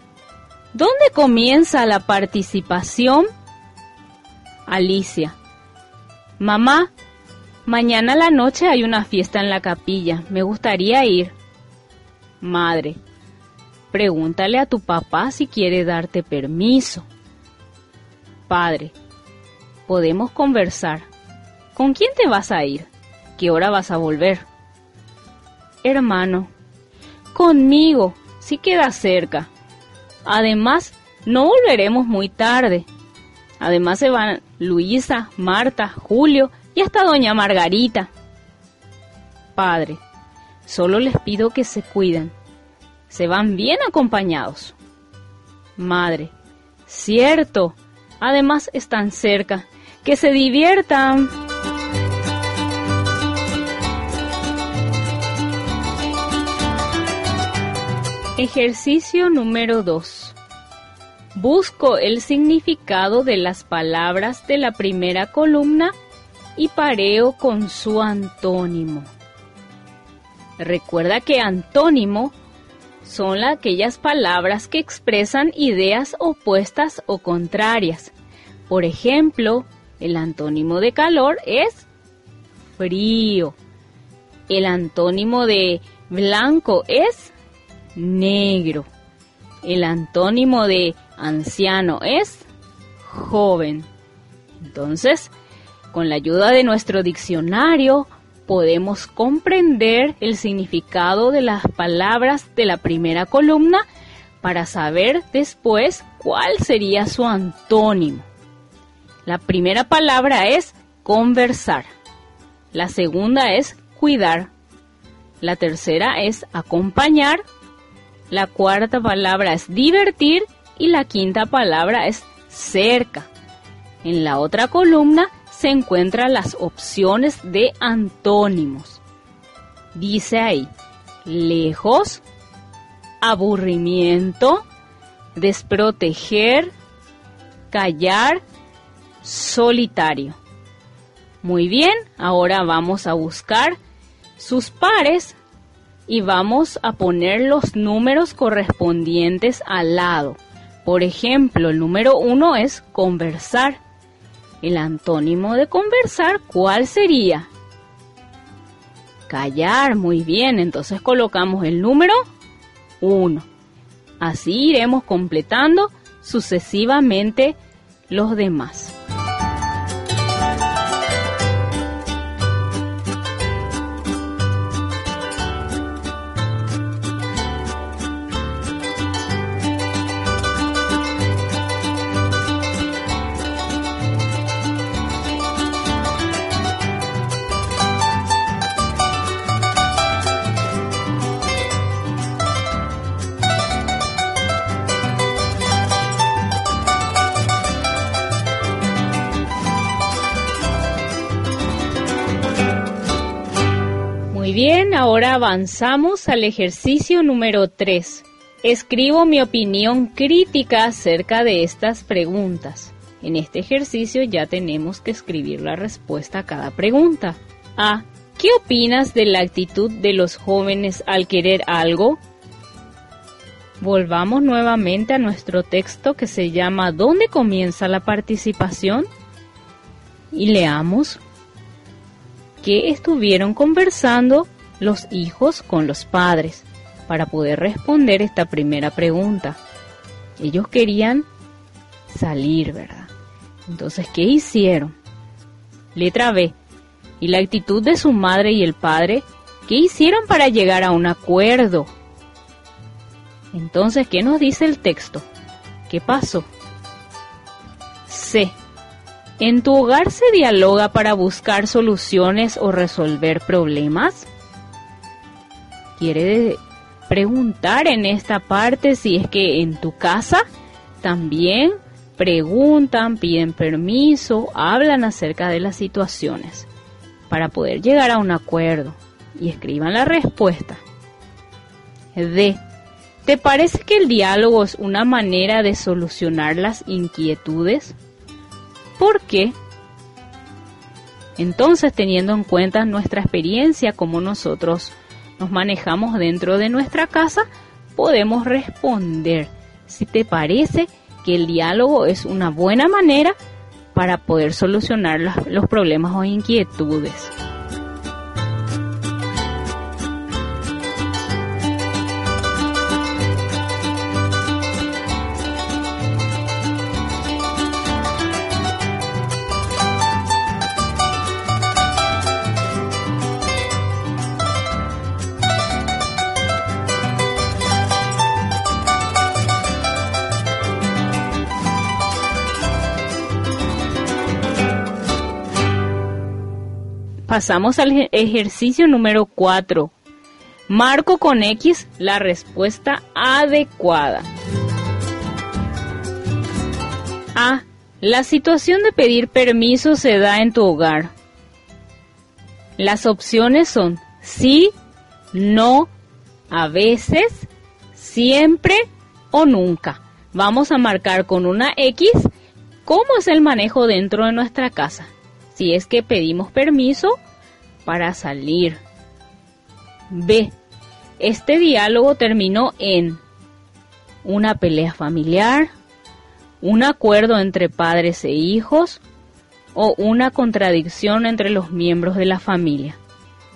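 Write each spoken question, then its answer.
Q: Este diálogo terminó en una pelea familiar, un acuerdo entre padres e hijos o una contradicción entre los miembros de la familia.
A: un acuerdo entre padres e hijos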